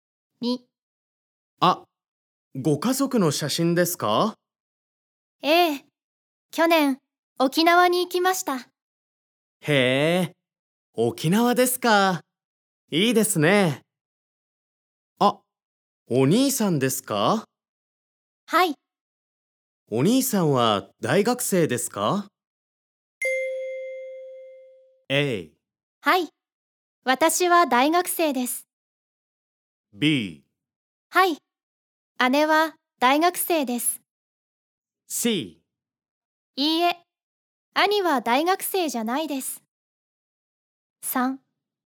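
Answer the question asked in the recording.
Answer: C: いいえ、兄は大学生じゃないです。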